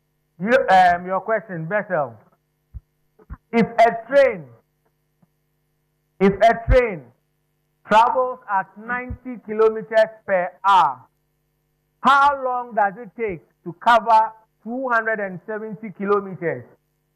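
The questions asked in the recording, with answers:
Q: If a train travels at 90 kilometers per hour, how long does it take to cover 270 kilometers?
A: 3 hours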